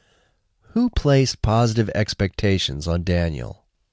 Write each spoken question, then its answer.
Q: Who placed positive expectations on Daniel?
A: Daniel's mother placed positive expectations on him.